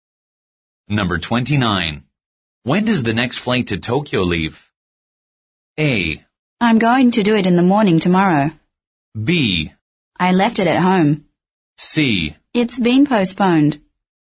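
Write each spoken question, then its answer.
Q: When does the next flight to Tokyo leave?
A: C: It's been postponed.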